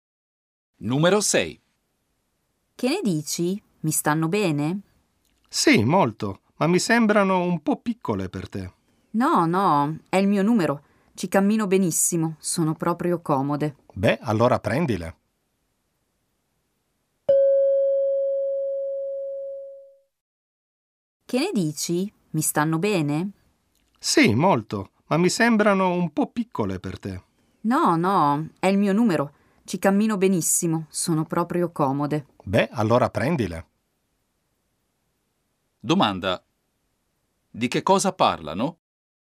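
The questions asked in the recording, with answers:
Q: Domanda. Di che cosa parlano?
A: Di scarpe (che lei vuole comprare)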